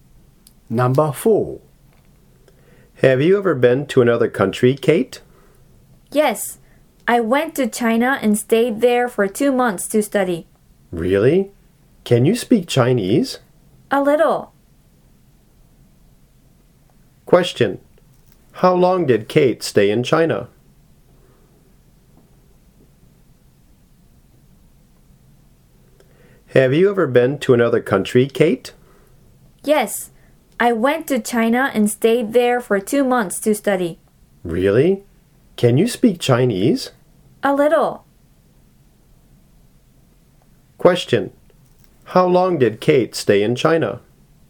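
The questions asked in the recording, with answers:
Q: How long did Kate stay in China?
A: For 2 months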